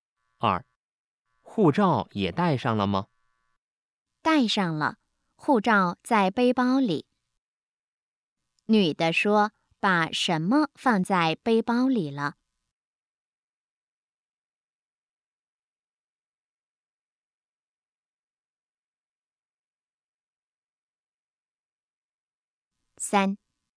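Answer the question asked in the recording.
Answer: 护照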